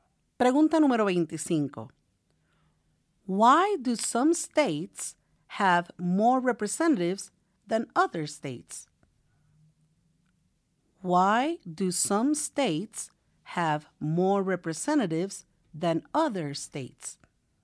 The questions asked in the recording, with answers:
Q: Why do some states have more representatives than other states?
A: because of the state's population, because they have more people, because some states have more people.